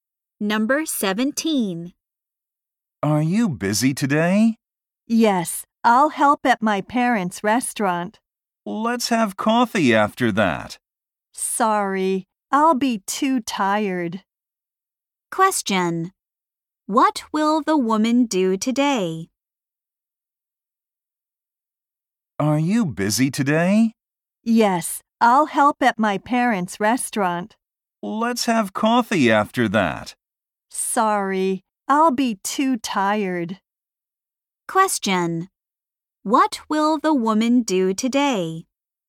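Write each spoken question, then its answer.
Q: What will the woman do today?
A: Help at her parents' restaurant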